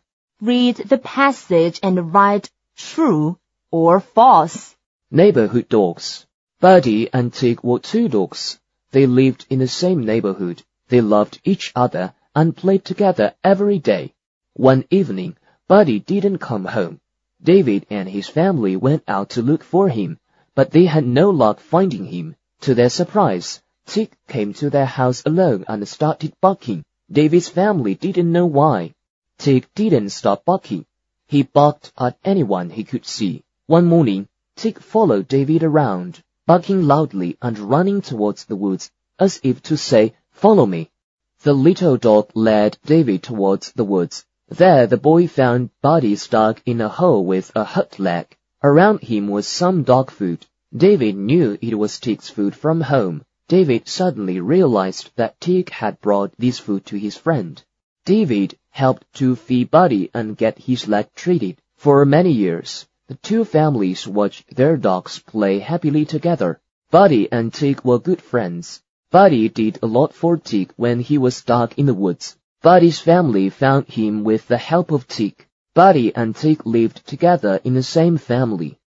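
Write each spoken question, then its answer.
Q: Buddy and Tig were good friends.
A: True

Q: Buddy did a lot for Tig when he was stuck in the woods.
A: False

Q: Buddy's family found him with the help of Tig.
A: True

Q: Buddy and Tig lived together in the same family.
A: False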